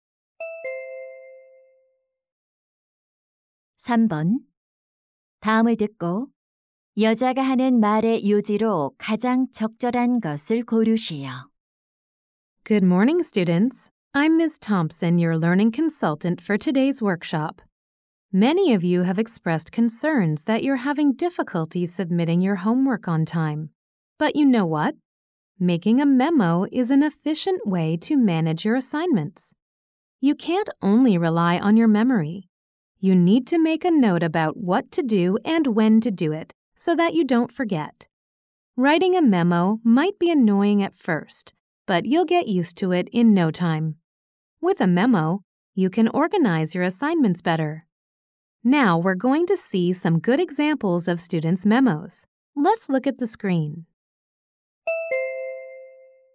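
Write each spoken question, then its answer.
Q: 다음을 듣고 여자가 하는 말의 요지로 가장 적절한 것을 고르시오.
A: 메모를 하면 과제를 효율적으로 관리할 수 있다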